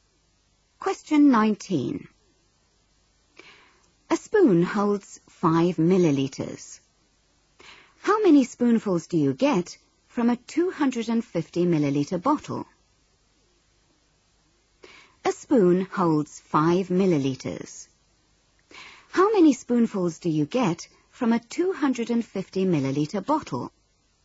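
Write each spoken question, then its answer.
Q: How many spoonfuls do you get from a 250-milliliter bottle?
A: 50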